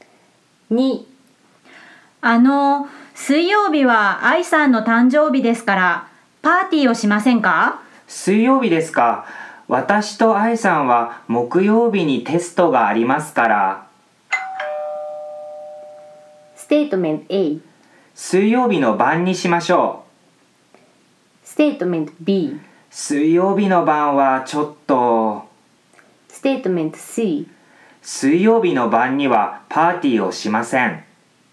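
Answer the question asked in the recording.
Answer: B: 水曜日の晩はちょっと。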